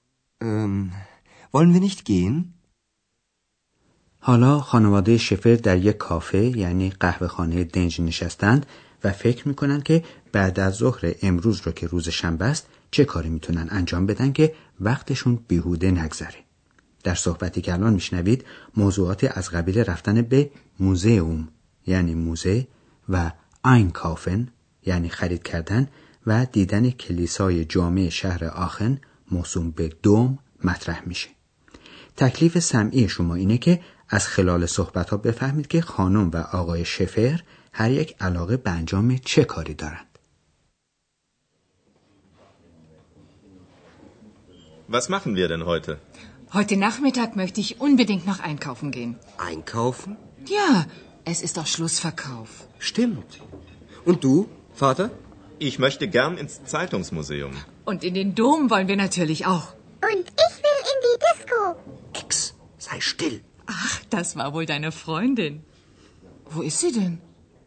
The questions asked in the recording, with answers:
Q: تکلیف سمعی شما اینه که از خلال صحبت ها بفهمید که خانم و آقای شفر هر یک علاقه به انجام چه کاری دارند.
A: بله، خانم شفر میل داره بره و قدری خرید کنه در حالی که آقای شفر میخواد بره موزه جراید آخن رو ببینه و هر دوتا هم میخوان کلیسای جامع شهر آخن رو هم ببینن.